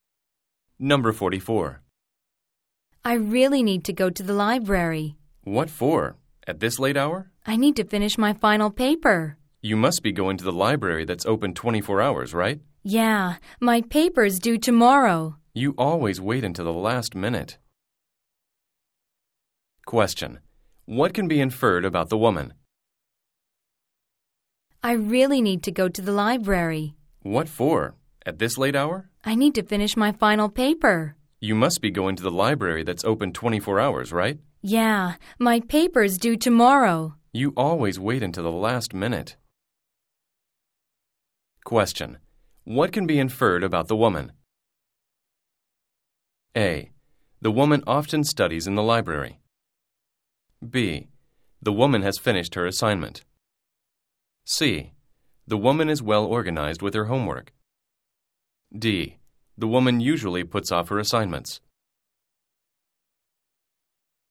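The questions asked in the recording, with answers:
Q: What can be inferred about the woman?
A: D: The woman usually puts off her assignments.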